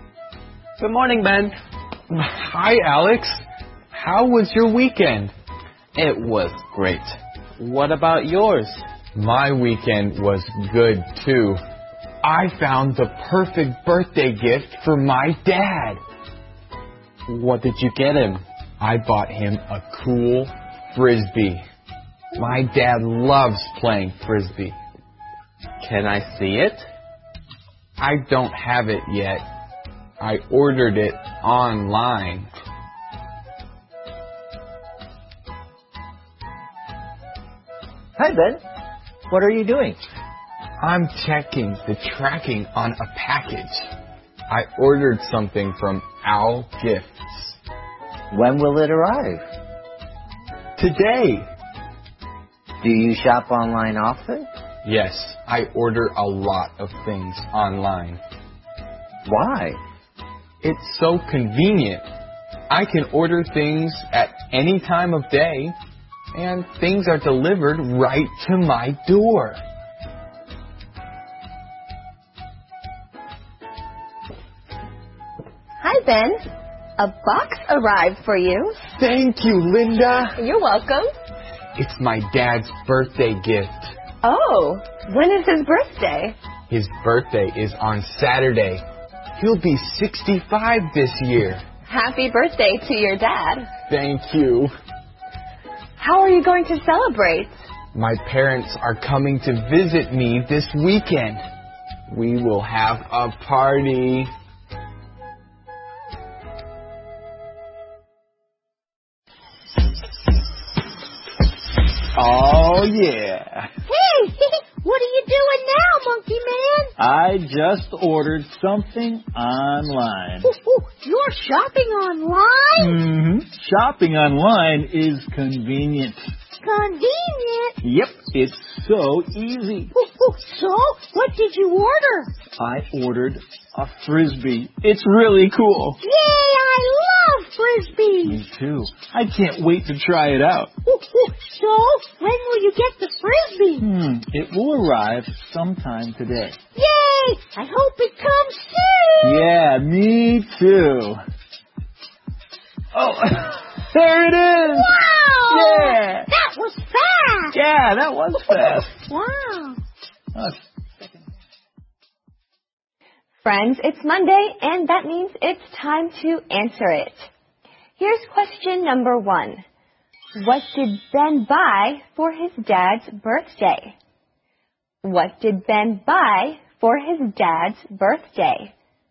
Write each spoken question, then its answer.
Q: What did Ben buy for his dad's birthday?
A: Ben bought a cool Frisbee for his dad's birthday.